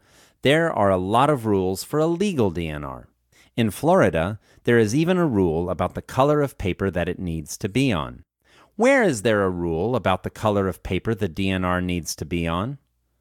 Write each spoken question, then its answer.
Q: Where is there a rule about the color of paper the DNR needs to be on?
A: In Florida, there is a rule about the color of paper that it needs to be on.